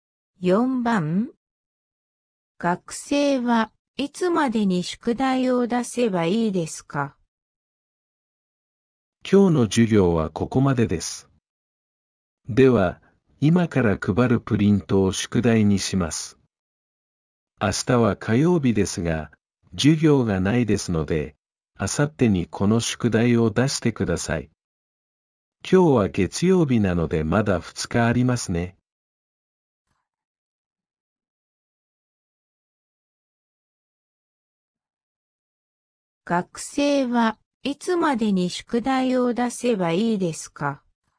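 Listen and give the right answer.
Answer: 明後日(水曜日)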